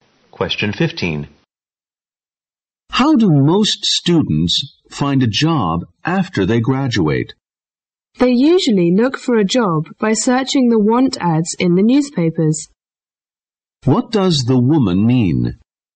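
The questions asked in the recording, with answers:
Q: What does the woman mean?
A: Most students find jobs by searching the want ads in newspapers.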